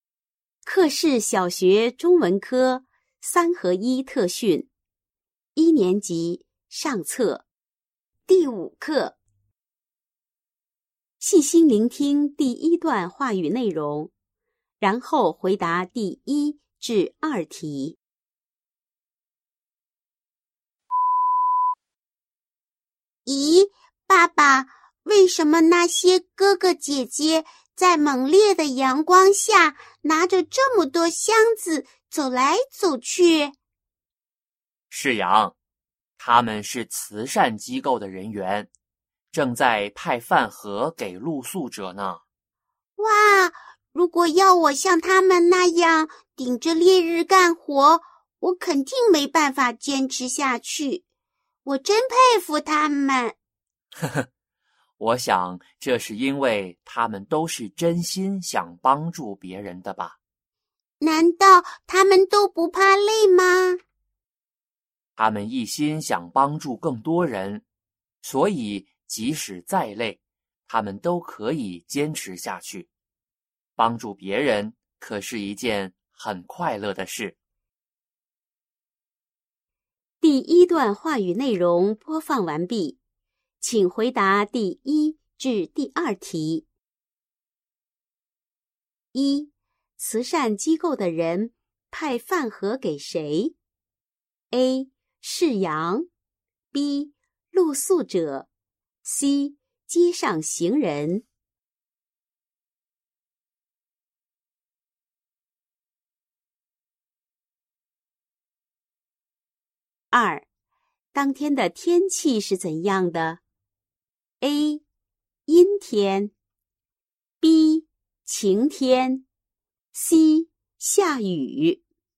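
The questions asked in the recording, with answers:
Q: 慈善机构的人派饭盒给谁? A. 世阳, B. 露宿者, C. 街上行人。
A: B: 露宿者

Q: 当天的天气是怎样的?A. 阴天, B. 晴天, C. 下雨。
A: B: 晴天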